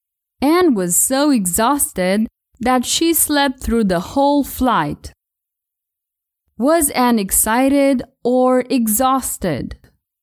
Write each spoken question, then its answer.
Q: Was Anne excited or exhausted?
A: She wasn't excited. She was exhausted.